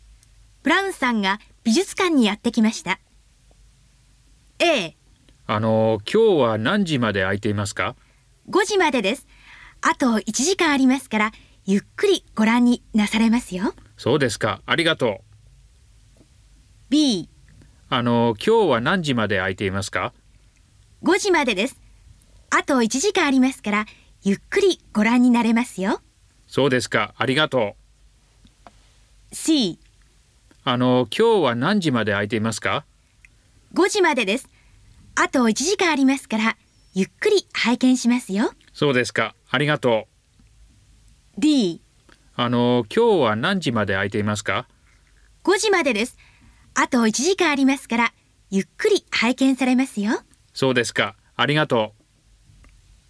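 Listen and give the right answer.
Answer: B: 5時までです。あと1時間ありますから、ゆっくりご覧になれますよ。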